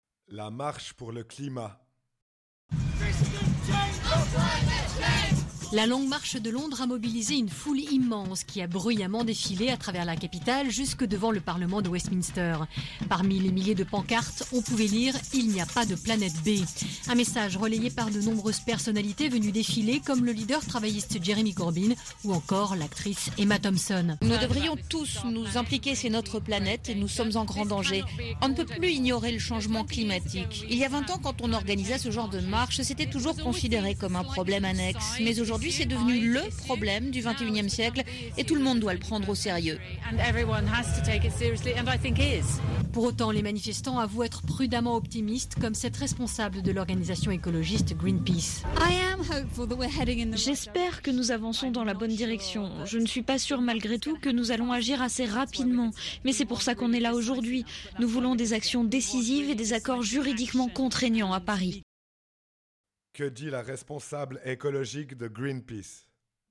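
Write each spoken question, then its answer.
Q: Que dit la responsable écologique de Greenpeace ?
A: Elle espère qu'on avance dans la bonne direction mais doute qu'on agisse assez vite ; elle veut des actions décisives et des accords juridiquement contraignants à Paris.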